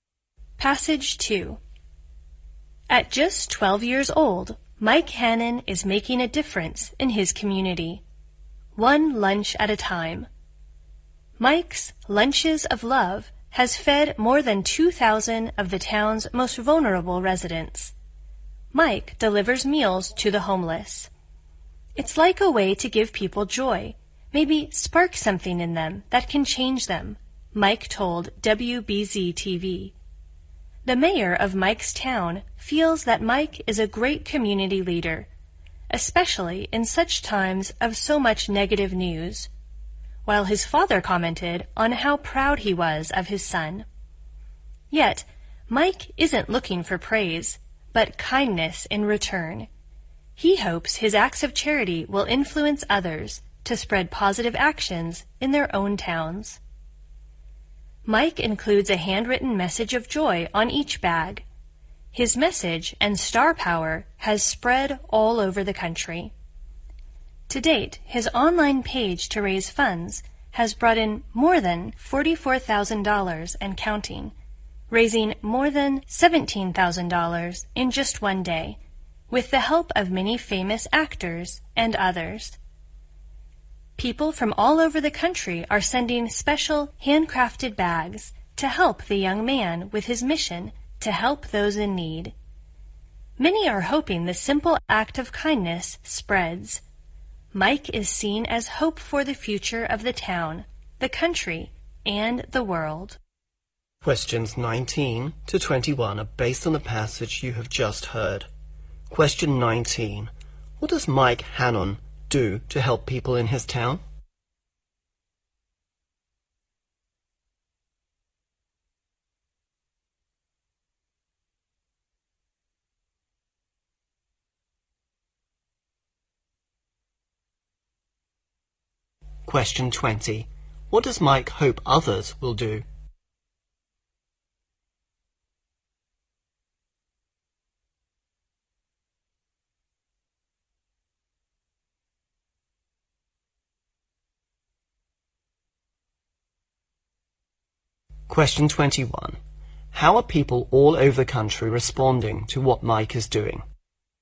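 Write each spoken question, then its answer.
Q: What does Mike Hannon do to help people in his town?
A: Delivers lunches to the homeless

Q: What does Mike hope others will do?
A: Spread positive actions in their own towns

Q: How are people all over the country responding to what Mike is doing?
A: Sending handcrafted bags and donating money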